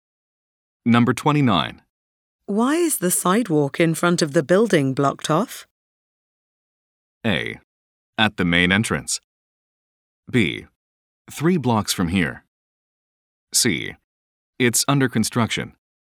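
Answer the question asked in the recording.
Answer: C: It's under construction.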